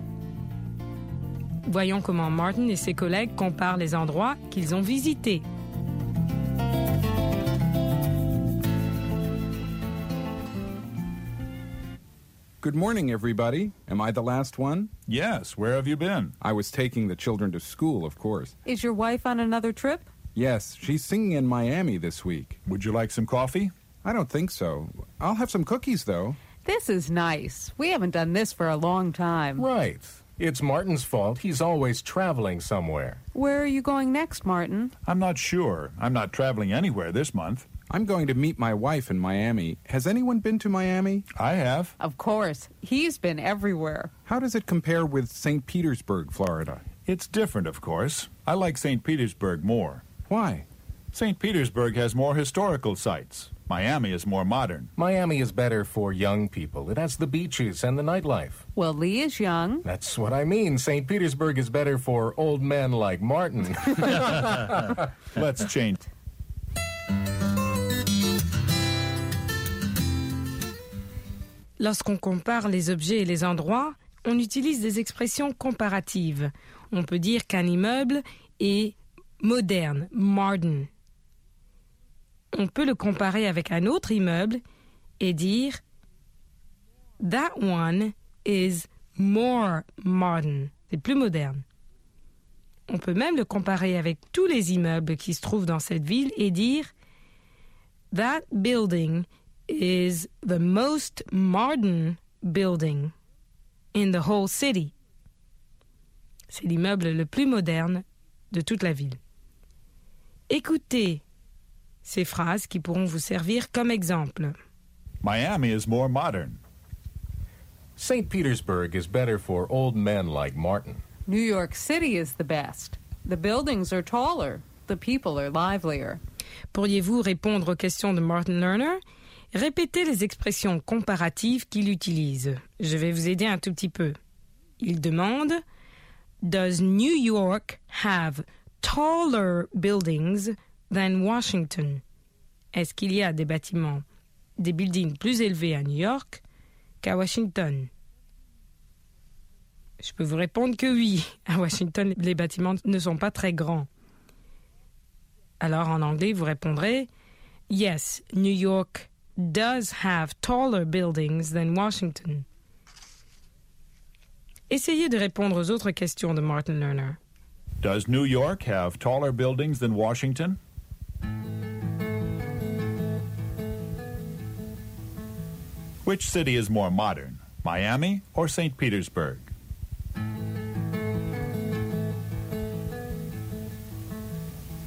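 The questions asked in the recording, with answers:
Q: Which city is more modern, Miami or St. Petersburg?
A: Miami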